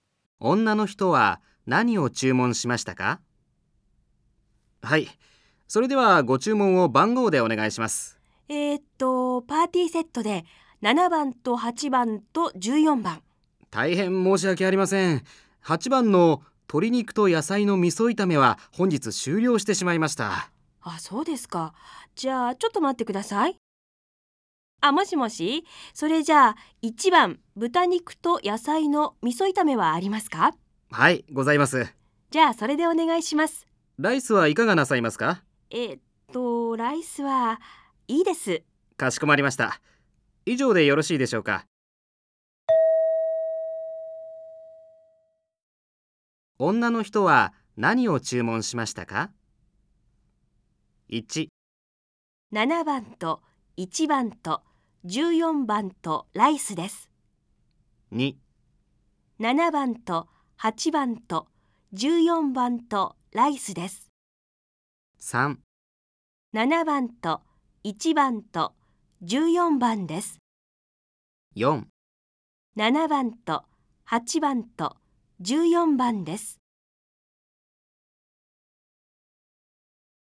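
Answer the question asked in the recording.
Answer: 3: 7番と1番と14番です。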